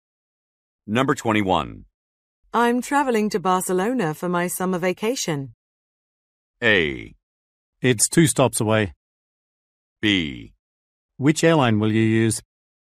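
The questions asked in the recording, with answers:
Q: I'm traveling to Barcelona for my summer vacation.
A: B: Which airline will you use?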